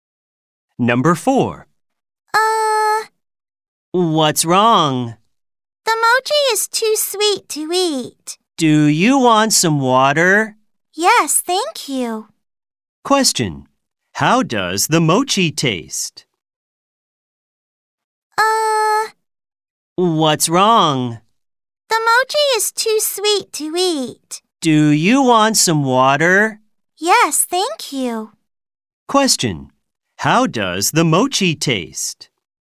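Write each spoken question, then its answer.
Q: How does the mochi taste?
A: Too sweet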